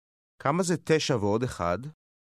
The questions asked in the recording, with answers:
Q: כמה זה 9 ועוד 1?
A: 10.